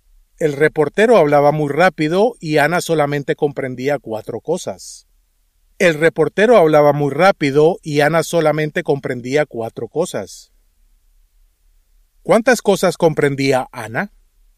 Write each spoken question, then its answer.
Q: ¿Cuántas cosas comprendía Ana?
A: Cuatro cosas.